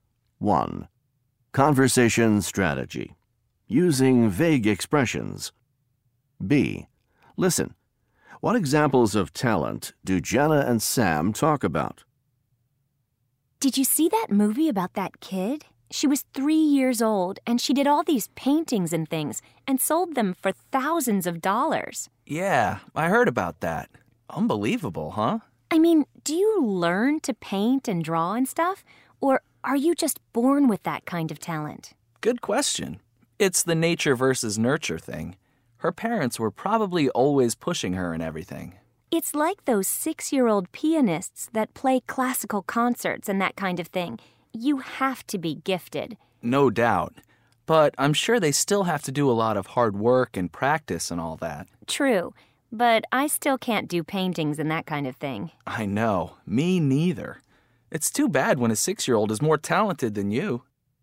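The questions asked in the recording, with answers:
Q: What examples of talent do Jenna and Sam talk about?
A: A 3-year-old girl who made paintings and sold them for thousands of dollars, and 6-year-old pianists who play classical concerts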